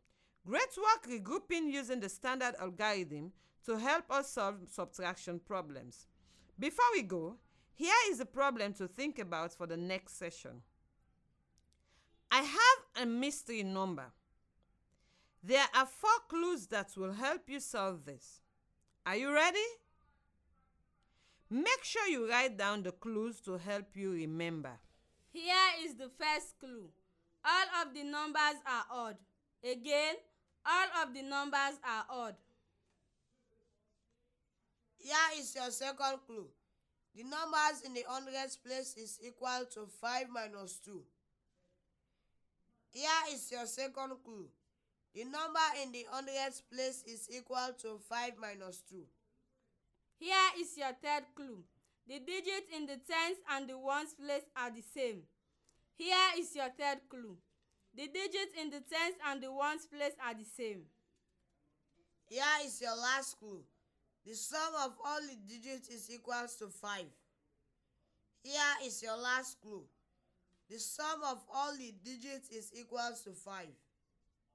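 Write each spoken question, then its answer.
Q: I have a mystery number. There are 4 clues that will help you solve this.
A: 311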